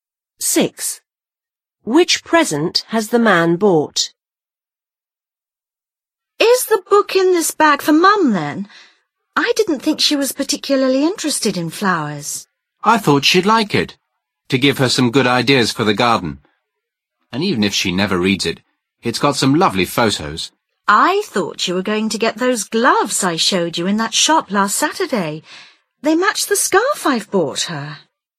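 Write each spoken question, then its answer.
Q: Which present has the man bought?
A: A book about flowers/gardening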